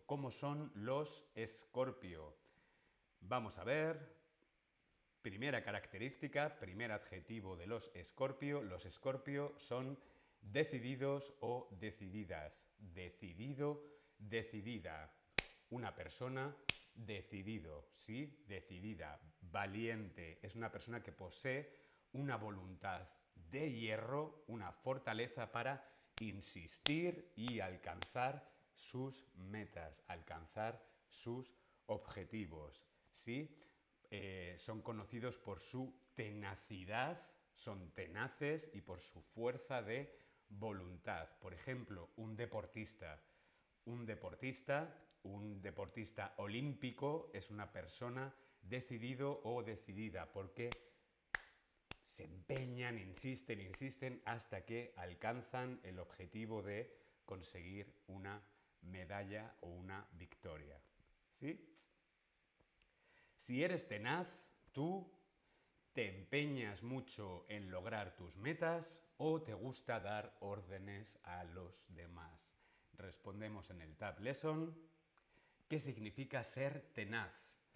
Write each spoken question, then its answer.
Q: ¿Qué significa ser tenaz?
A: Ser tenaz, ser decidido significa que te empeñas mucho en lograr tus metas.